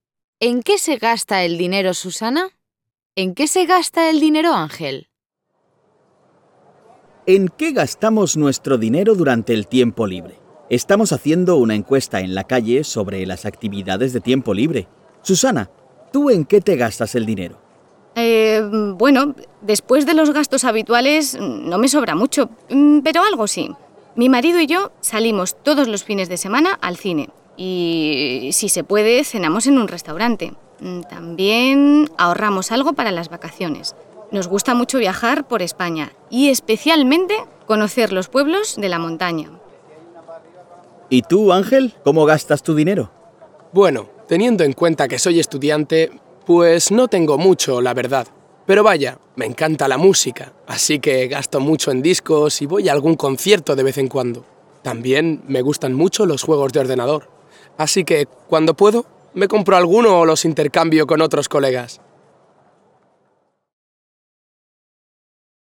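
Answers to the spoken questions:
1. En salir al cine y cenar en restaurantes los fines de semana, y en ahorrar para viajar en vacaciones
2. En música (discos y conciertos) y juegos de ordenador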